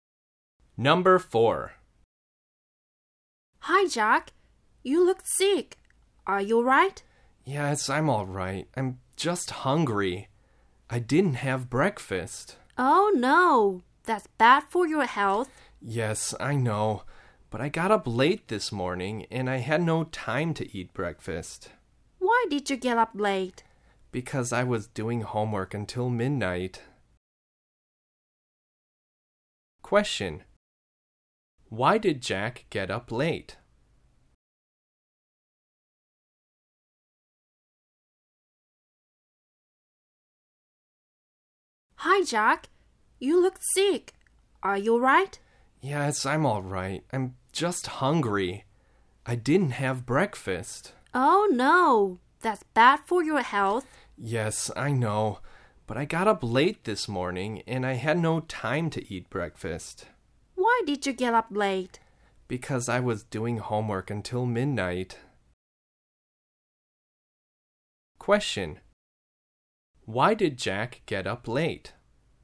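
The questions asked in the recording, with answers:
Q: Why did Jack get up late?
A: Because he was doing homework until midnight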